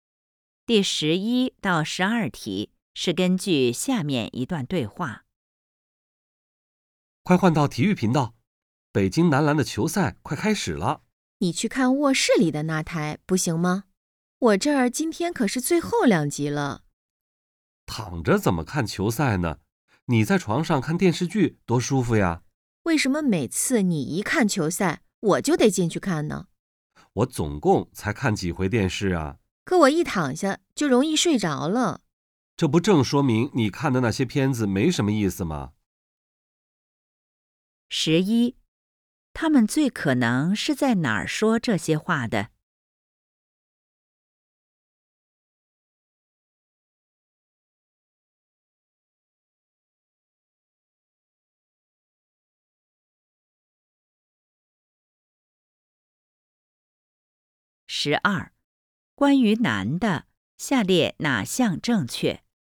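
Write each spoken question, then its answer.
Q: 他们最可能是在哪儿说这些话的?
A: 家里(客厅)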